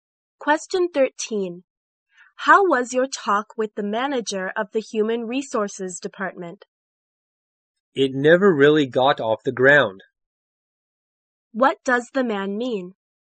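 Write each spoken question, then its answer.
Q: What does the man mean?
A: The talk made no progress.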